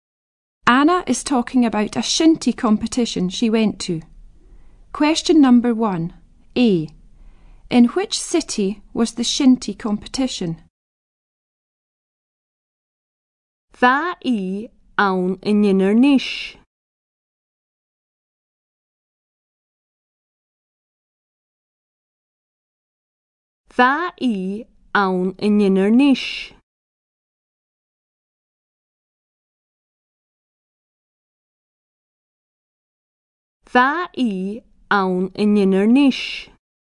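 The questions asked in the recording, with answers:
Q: In which city was the shinty competition?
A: Inverness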